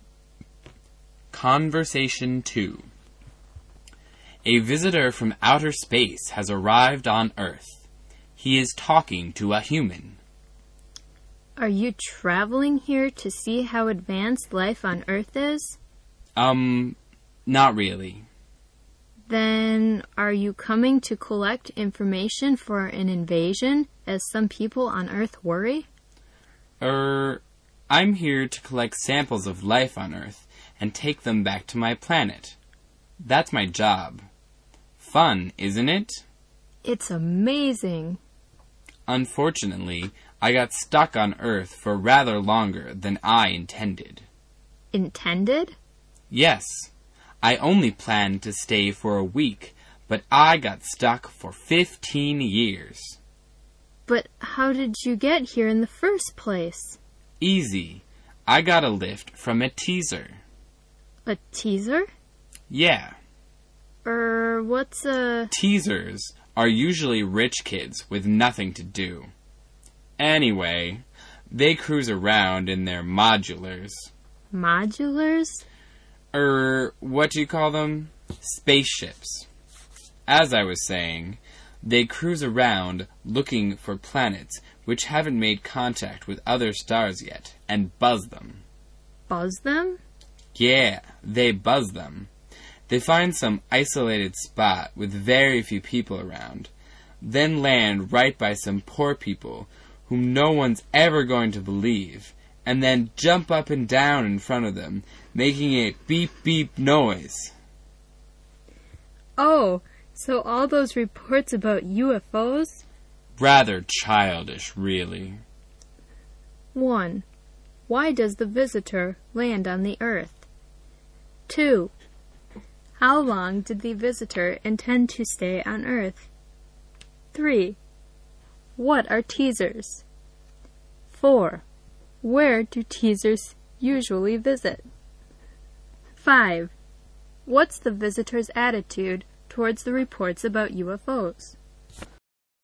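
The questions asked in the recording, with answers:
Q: Why does the visitor land on the Earth?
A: To collect samples of life on Earth and take them back to his planet

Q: How long did the visitor intend to stay on Earth?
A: A week

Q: What are teasers?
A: Rich kids with nothing to do who cruise around in spaceships

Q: Where do teasers usually visit?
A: Planets that haven't made contact with other stars yet, landing at isolated spots with few people around

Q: What's the visitor's attitude towards the reports about UFOs?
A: He thinks the UFO visits are rather childish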